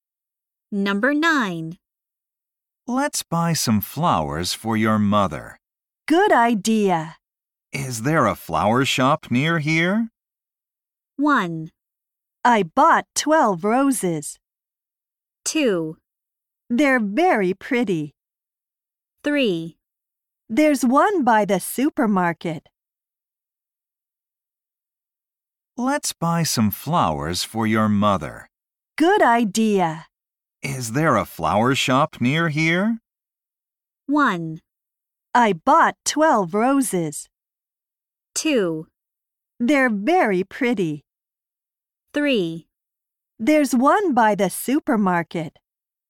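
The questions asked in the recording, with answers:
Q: Is there a flower shop near here?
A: 3: There's one by the supermarket.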